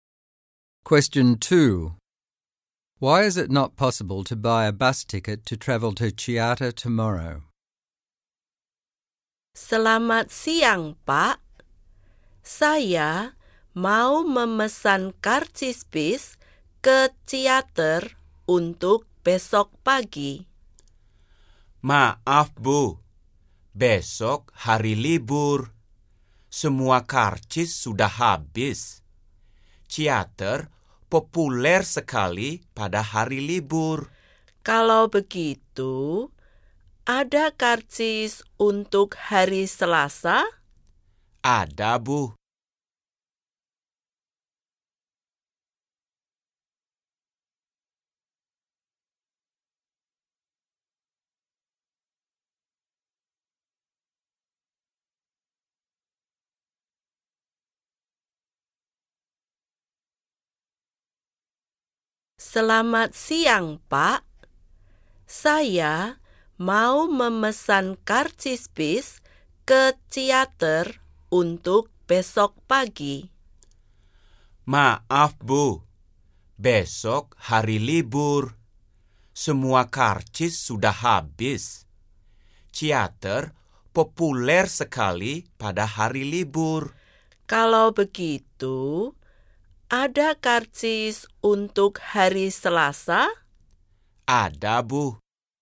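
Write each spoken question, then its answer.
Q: Why is it not possible to buy a bus ticket to travel to Chiata tomorrow?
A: Tomorrow is a holiday and all tickets are sold out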